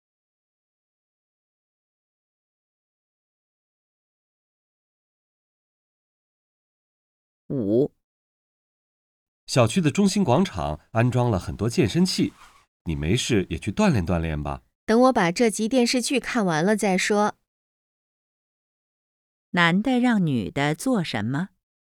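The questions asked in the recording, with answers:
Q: 男的让女的做什么?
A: 去小区广场用健身器锻炼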